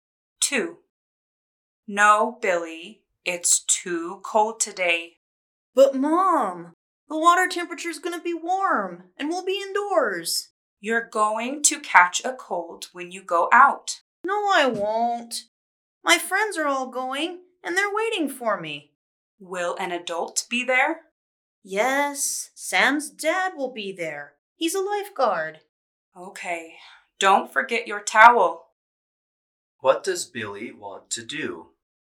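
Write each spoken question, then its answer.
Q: What does Billy want to do?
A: Go swimming at an indoor pool with his friends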